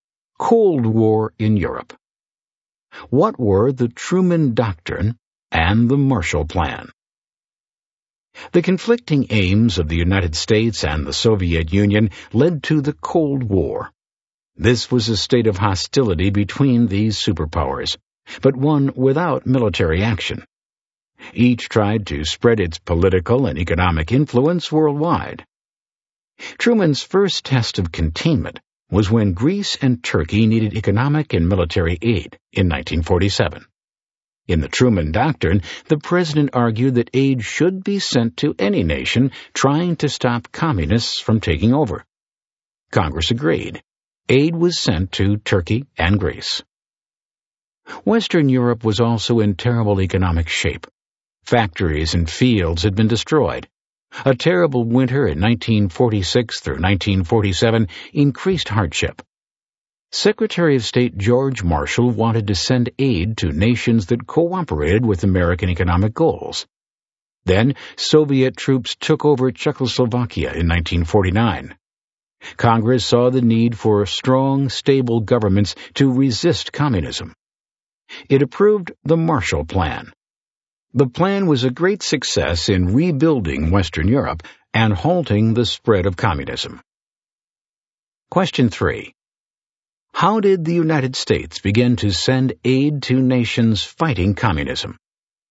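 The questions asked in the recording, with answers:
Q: How did the United States begin to send aid to nations fighting communism?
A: Through the Truman Doctrine (aid to Greece and Turkey) and then the Marshall Plan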